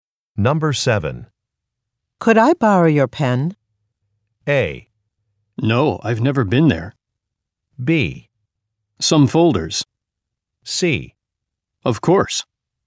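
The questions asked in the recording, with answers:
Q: Could I borrow your pen?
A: C: Of course.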